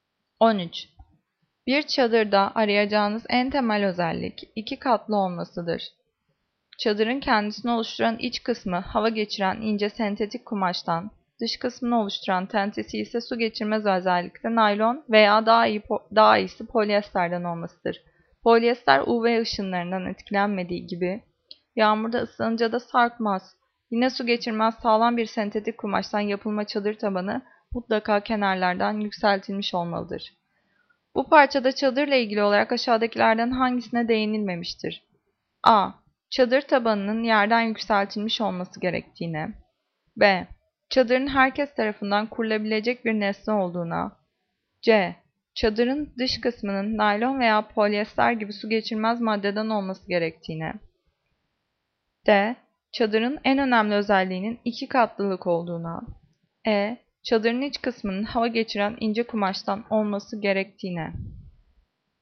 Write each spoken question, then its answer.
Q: Bu parçada çadırla ilgili olarak aşağıdakilerden hangisine değinilmemiştir?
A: Cevap B. Çadırın herkes tarafından kurulabilecek bir nesne olduğuna.